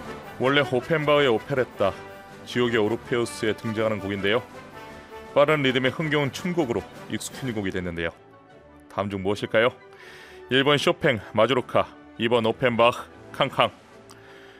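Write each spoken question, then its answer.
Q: 다음 중 무엇일까요? 1번 쇼팽, 마주로카, 2번 오펜바흐, 캉캉.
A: 2: 오펜바흐, 캉캉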